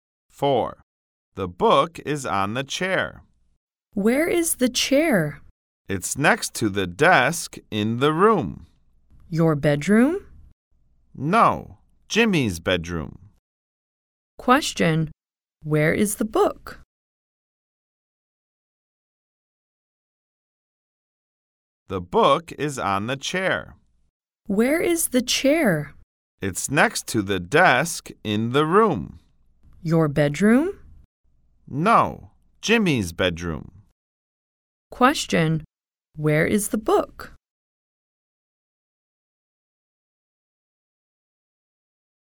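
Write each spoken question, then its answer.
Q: Question, where is the book?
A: On the chair in Jimmy's bedroom.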